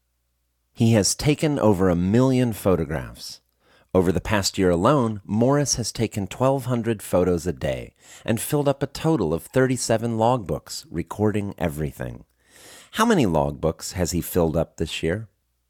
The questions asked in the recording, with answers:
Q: How many logbooks has he filled up this year?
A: He has filled up 37 logbooks this year.